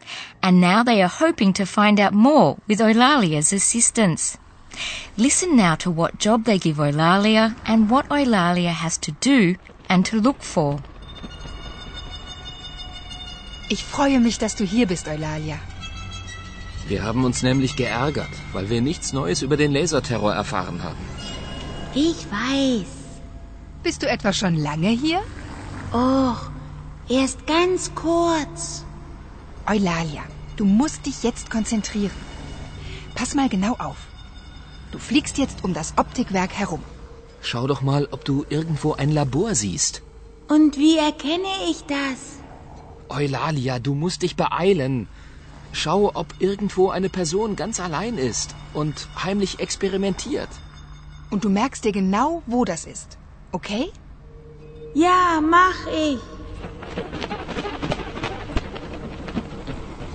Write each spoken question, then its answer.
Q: Listen now to what job they give Eulalia and what Eulalia has to do and to look for.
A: Eulalia is to fly around the optics factory.